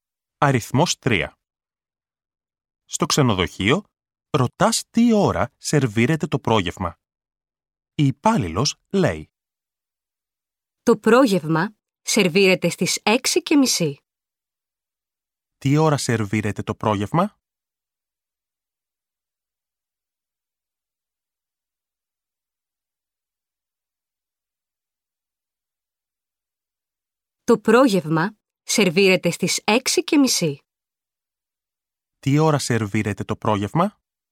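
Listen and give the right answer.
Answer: Στις 6:30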